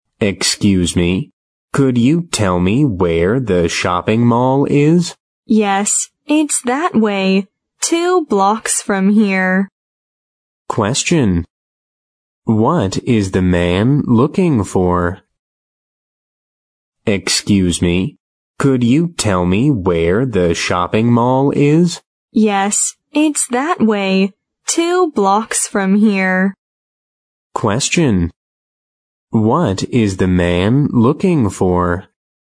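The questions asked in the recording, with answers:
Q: What is the man looking for?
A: The shopping mall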